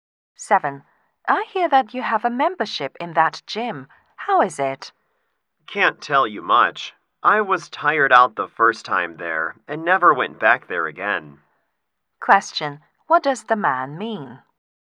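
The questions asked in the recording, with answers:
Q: What does the man mean?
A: He went to the gym only once and doesn't know much about it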